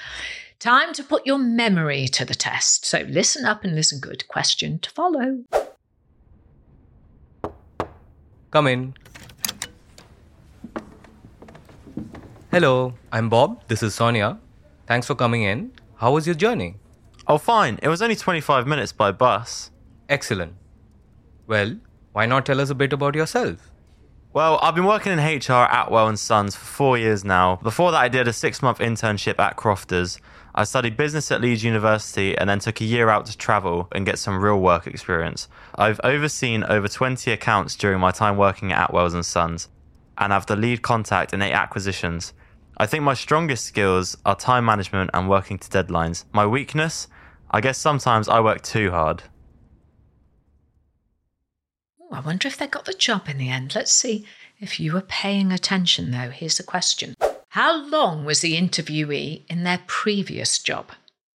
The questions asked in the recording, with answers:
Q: How long was the interviewee in their previous job?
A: The answer I was looking for was 4 years.